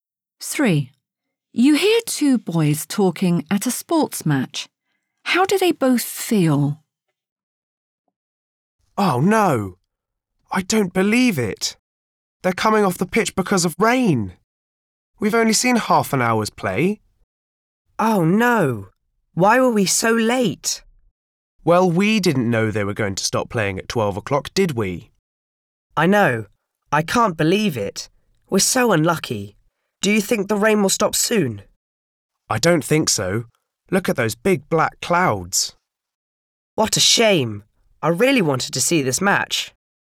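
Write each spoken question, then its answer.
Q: How do they both feel?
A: disappointed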